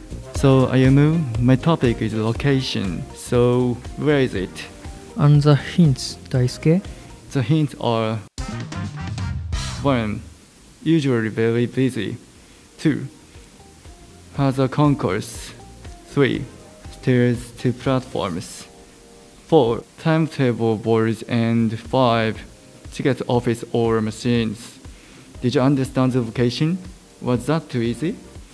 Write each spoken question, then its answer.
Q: Did you understand the location?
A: The location was railway station, a train station.